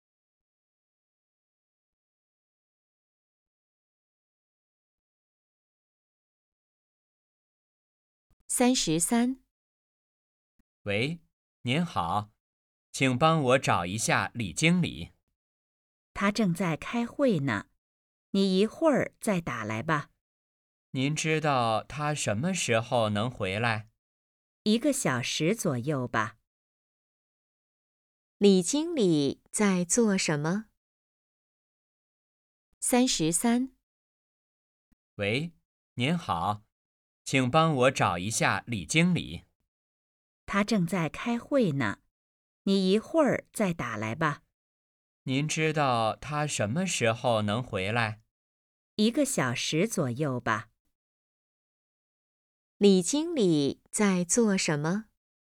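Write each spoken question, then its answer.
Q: 李经理在做什么?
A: 开会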